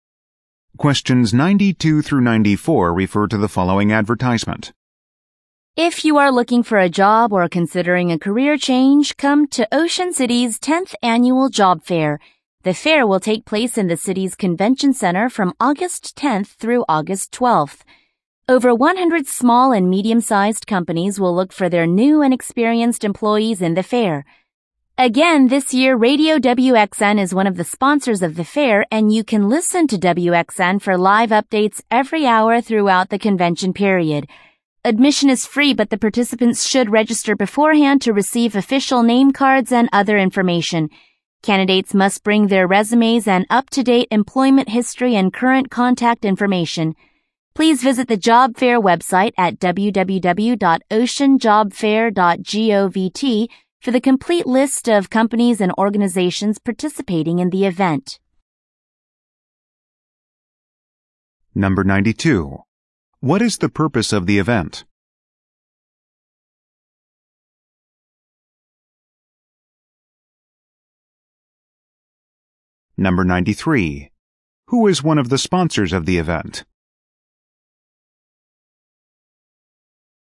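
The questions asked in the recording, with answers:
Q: What is the purpose of the event?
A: To help job seekers find jobs with hiring companies

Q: Who is one of the sponsors of the event?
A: Radio WXN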